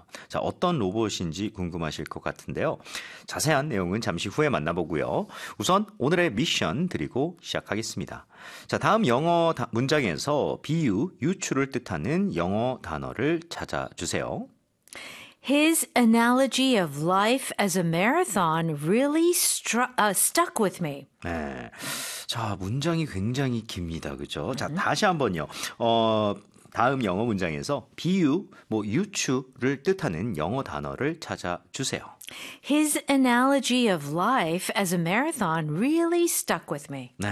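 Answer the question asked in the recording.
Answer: analogy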